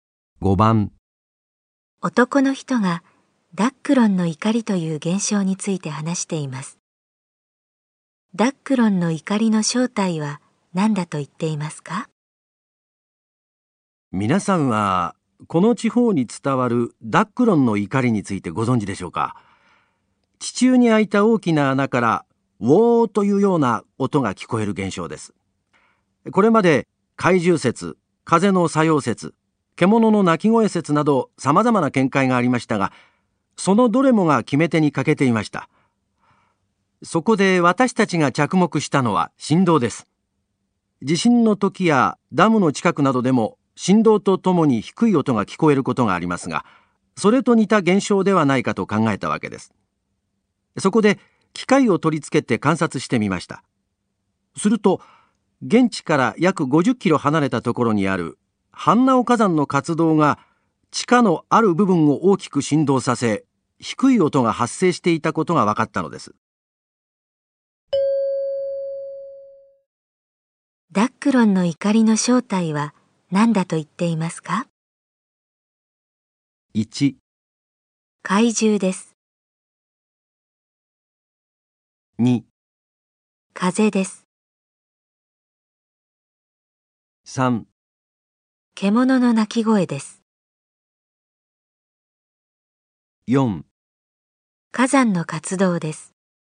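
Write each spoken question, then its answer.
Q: りの正体は何だと言っていますか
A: 4: 火山の活動です。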